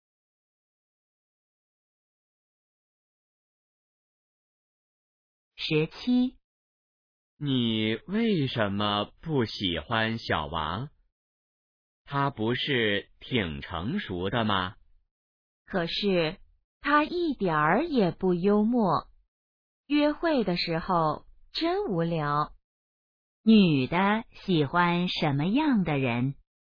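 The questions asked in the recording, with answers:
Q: 女的喜欢什么样的人?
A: 幽默的人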